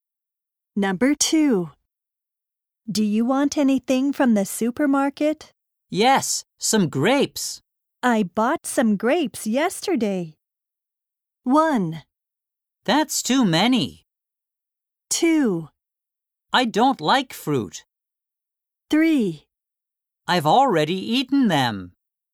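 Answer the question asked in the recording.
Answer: 3: I've already eaten them.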